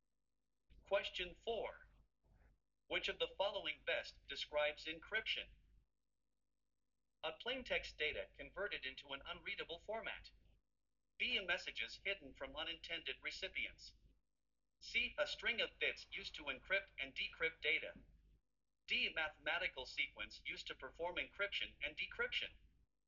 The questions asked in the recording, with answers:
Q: Which of the following best describes encryption?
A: The correct answer is A.